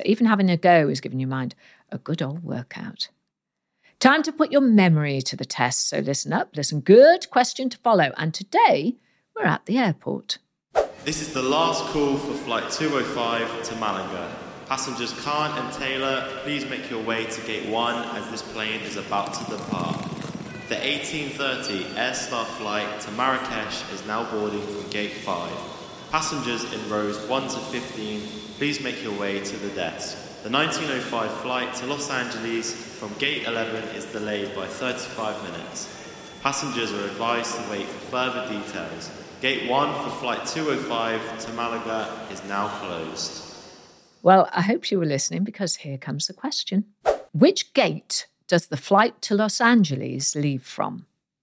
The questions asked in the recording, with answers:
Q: Which gate does the flight to Los Angeles leave from?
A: And the answer was, it leaves from gate 11.